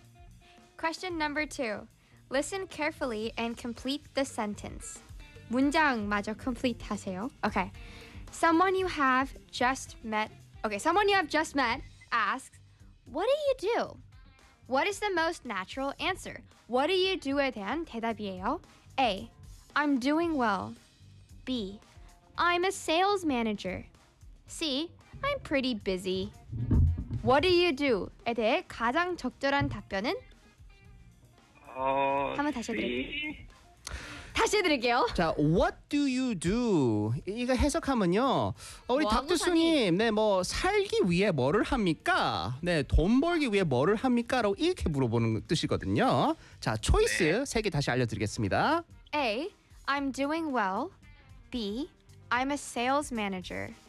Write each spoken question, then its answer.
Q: Okay, someone you have just met asks, "What do you do?" What is the most natural answer?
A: B. I'm a sales manager?